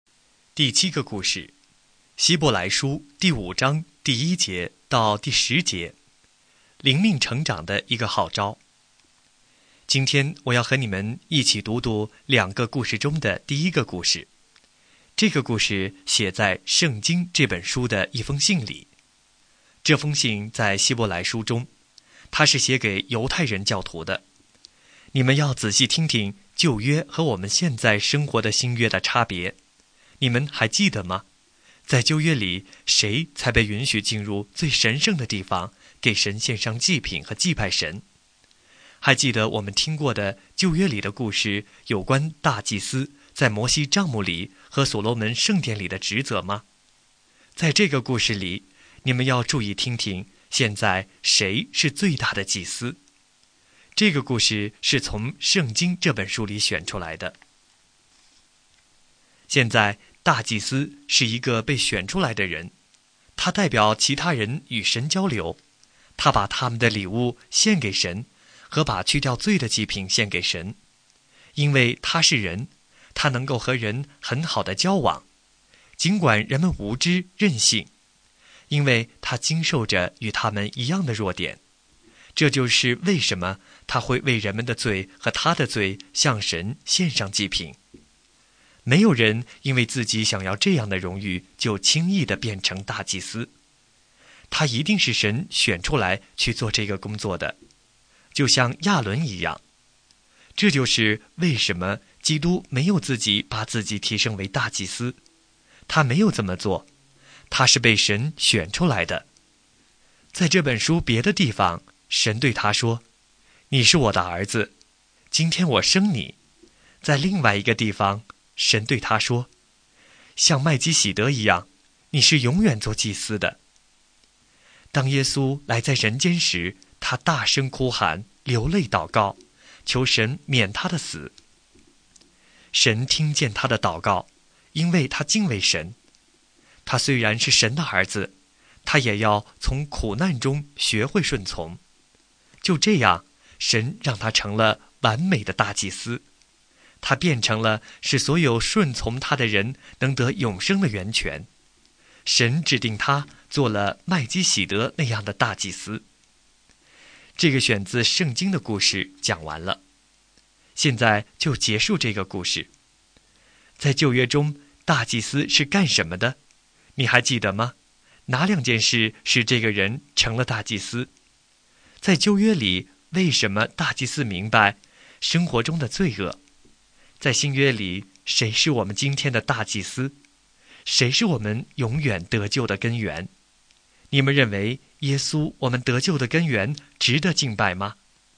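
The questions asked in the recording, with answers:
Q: 在旧约中,大祭司是干什么的?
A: 代表人与神交流,把人们的礼物和去掉罪的祭品献给神

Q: 在旧约里,为什么大祭司明白生活中的罪恶?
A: 因为他是人,经受着与人们一样的弱点

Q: 在新约里,谁是我们今天的大祭司?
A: 耶稣基督

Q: 谁是我们永远得救的根源?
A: 耶稣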